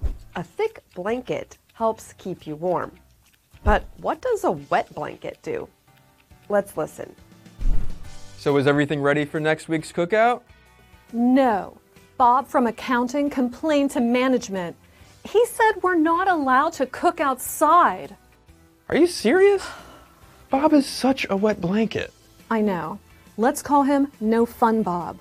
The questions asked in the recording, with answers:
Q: But what does a wet blanket do?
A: A wet blanket is someone who says or does things that stop other people from enjoying themselves.